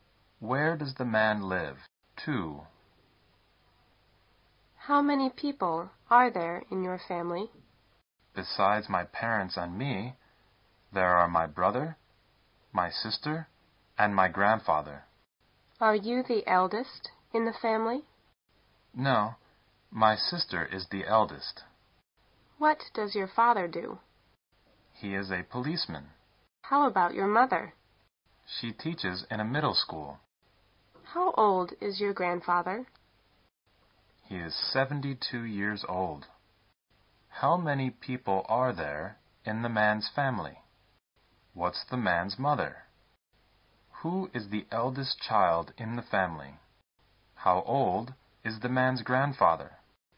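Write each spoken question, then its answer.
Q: How many people are there in the man's family?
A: Six

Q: What's the man's mother?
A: A middle school teacher

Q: Who is the eldest child in the family?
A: His sister

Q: How old is the man's grandfather?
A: 72 years old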